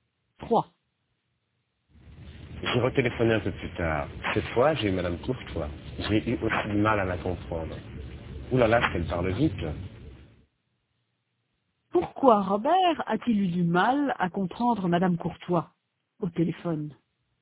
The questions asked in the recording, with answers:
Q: Pourquoi Robert a-t-il eu du mal à comprendre Madame Courtois au téléphone?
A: Parce qu'elle parle vite.